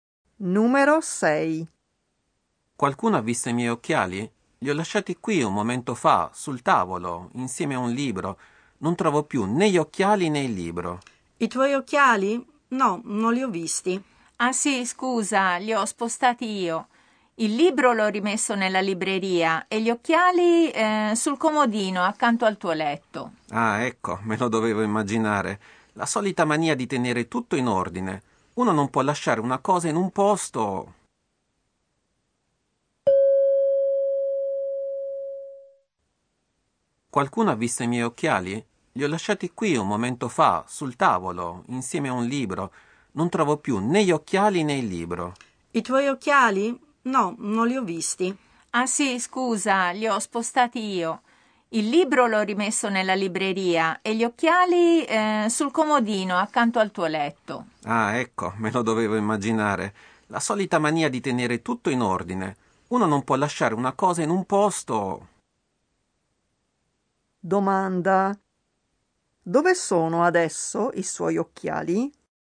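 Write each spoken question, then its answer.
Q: Dove sono adesso i suoi occhiali?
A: Sul comodino accanto al suo letto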